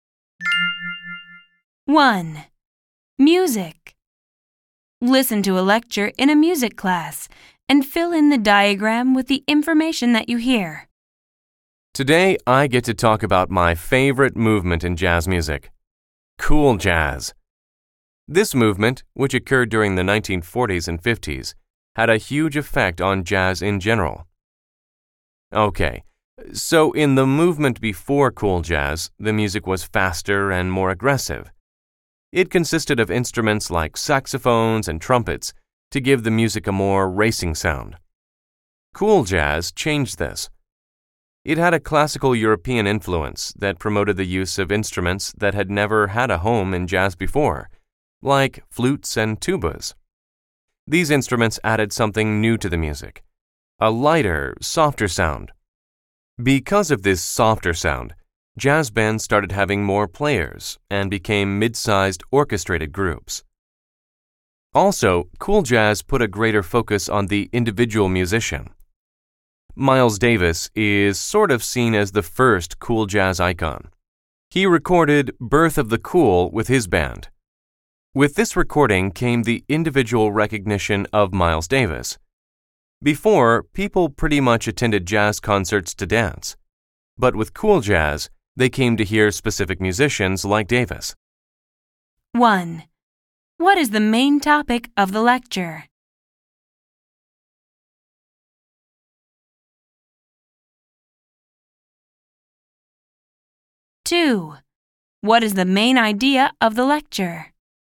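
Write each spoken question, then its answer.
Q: What is the main topic of the lecture?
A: Cool jazz, a movement in jazz music in the 1940s and 50s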